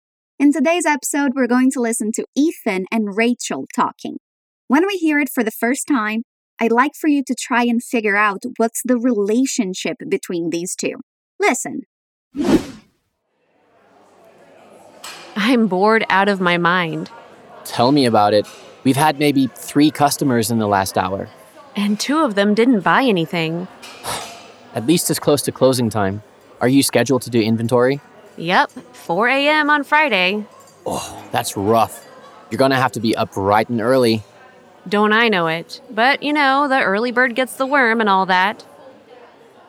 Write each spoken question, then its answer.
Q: I'd like for you to try and figure out what's the relationship between these two.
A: Rachel and Ethan are co-workers.